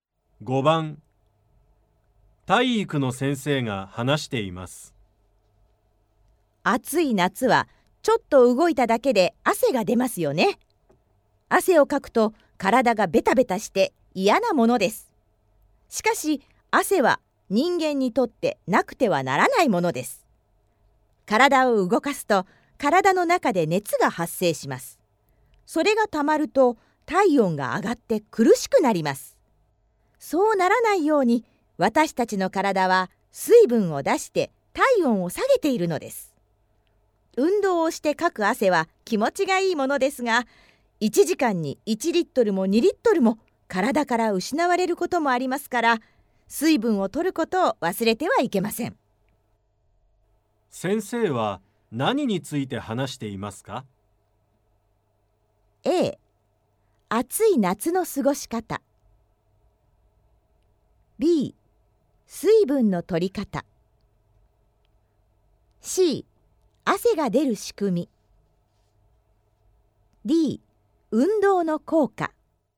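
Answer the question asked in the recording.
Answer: C: 汗が出る仕組み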